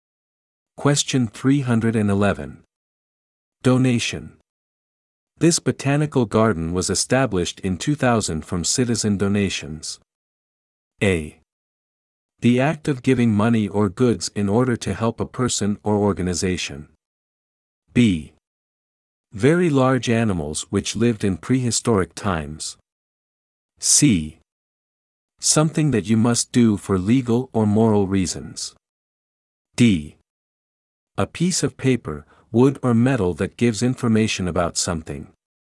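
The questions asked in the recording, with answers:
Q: Donation. This botanical garden was established in 2000 from citizen donations.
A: A: The act of giving money or goods in order to help a person or organization.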